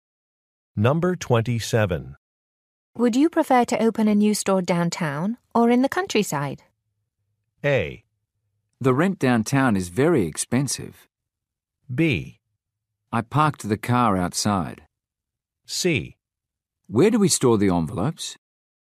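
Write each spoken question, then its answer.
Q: Would you prefer to open a new store downtown or in the countryside?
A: A: The rent downtown is very expensive.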